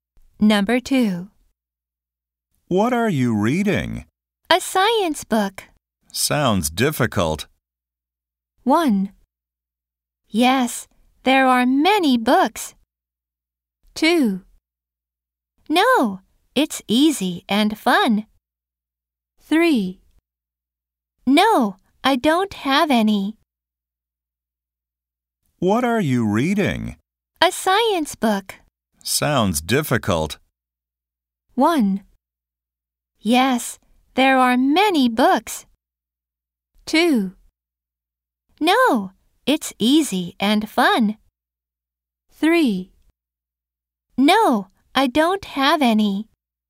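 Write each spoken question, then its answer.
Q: Sounds difficult.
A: 2: No, it's easy and fun.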